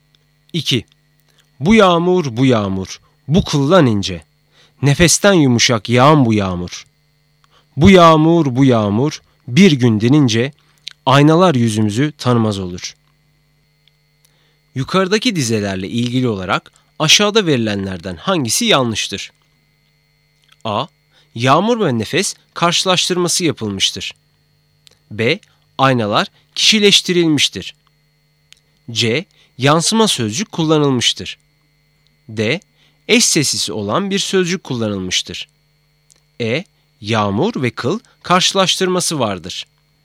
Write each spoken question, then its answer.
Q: Yukarıdaki dizelerle ilgili olarak aşağıda verilenlerden hangisi yanlıştır?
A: Doğru cevap C, yansıma sözcük kullanılmıştır.